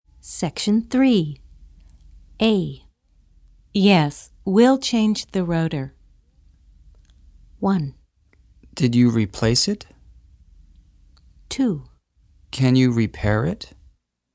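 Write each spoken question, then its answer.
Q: Yes, we'll change the rotor.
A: 2: Can you repair it?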